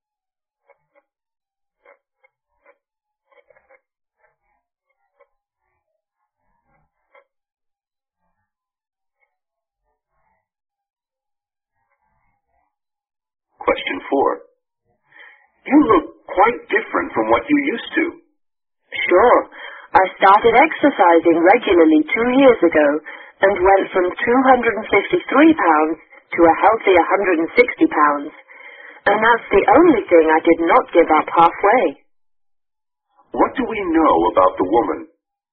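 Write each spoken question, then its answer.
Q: What do we know about the woman?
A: She lost a lot of weight by exercising regularly for 2 years.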